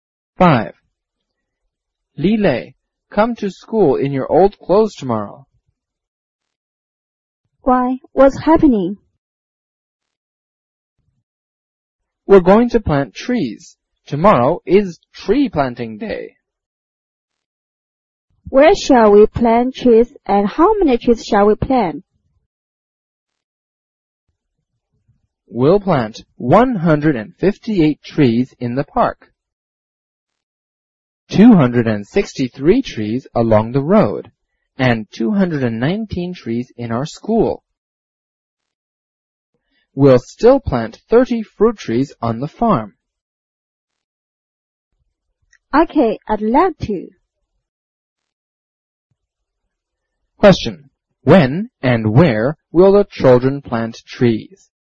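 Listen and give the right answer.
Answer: Tomorrow (Tree Planting Day), in the park, along the road, in their school and on the farm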